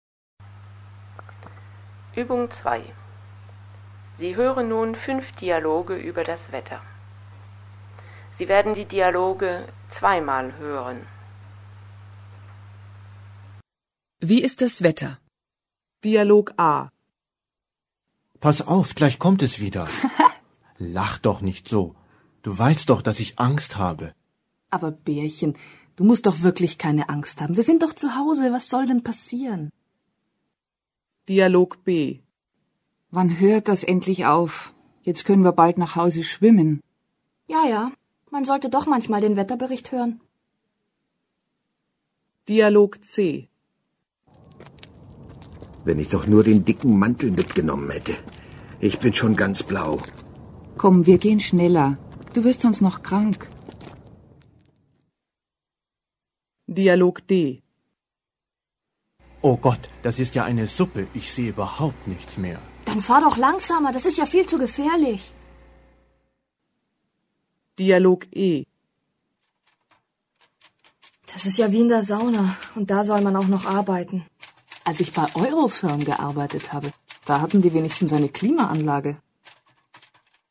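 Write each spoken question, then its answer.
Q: Wie ist das Wetter?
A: Es regnet stark

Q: Wie ist das Wetter?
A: Es ist kalt

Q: Wie ist das Wetter?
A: Nebel

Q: Wie ist das Wetter?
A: Es ist heiß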